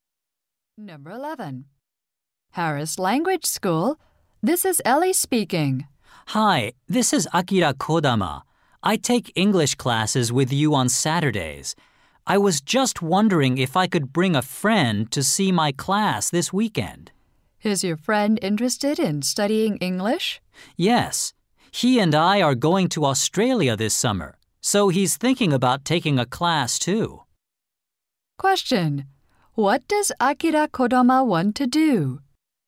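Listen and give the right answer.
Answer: Bring a friend to see his class.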